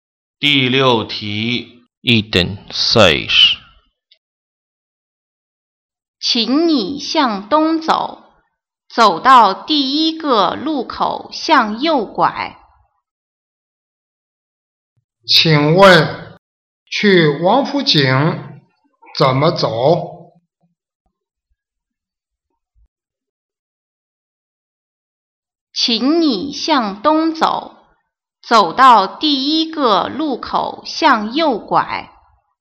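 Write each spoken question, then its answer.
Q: 请问,去王府井怎么走?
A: 向东走,走到第一个路口向右拐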